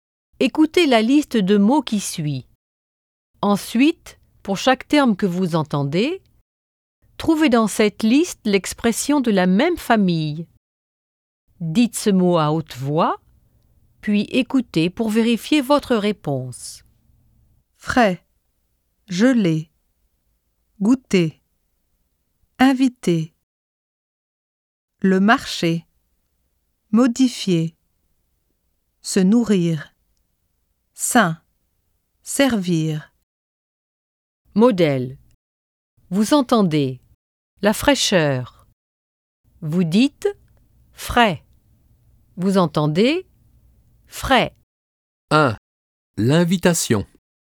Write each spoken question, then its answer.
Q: L'invitation.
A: Invité.